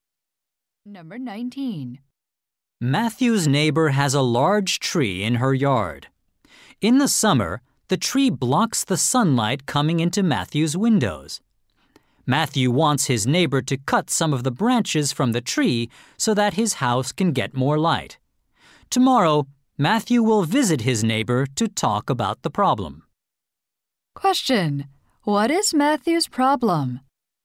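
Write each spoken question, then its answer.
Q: What is Matthew's problem?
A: His neighbor's tree blocks sunlight to his house.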